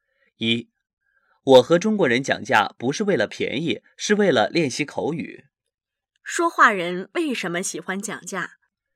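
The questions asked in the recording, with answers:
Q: 说话人为什么喜欢讲价?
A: 为了练习口语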